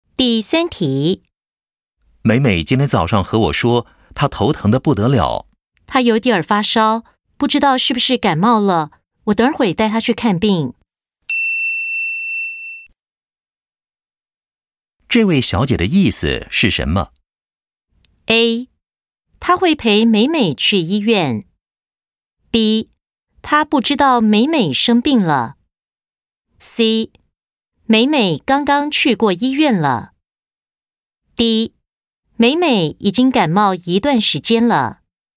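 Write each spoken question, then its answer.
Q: 这位小姐的意思是什么?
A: A: 她会陪美美去医院。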